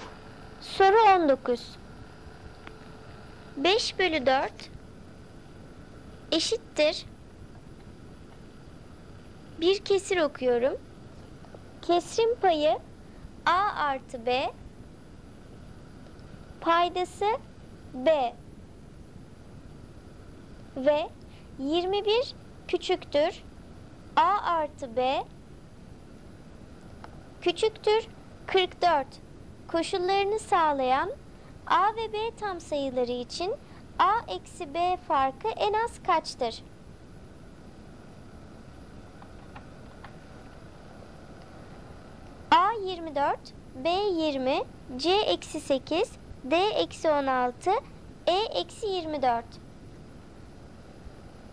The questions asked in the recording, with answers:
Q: Koşullarını sağlayan A ve B tam sayıları için A eksi B farkı en az kaçtır?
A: Doğru cevap E eksi 24.